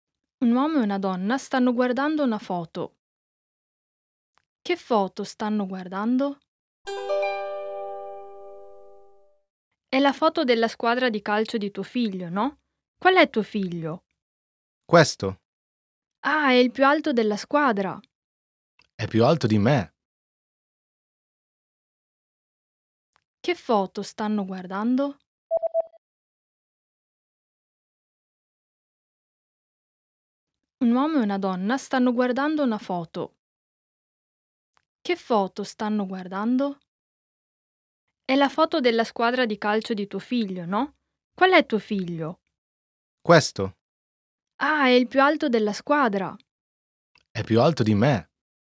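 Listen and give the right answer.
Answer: La foto della squadra di calcio del figlio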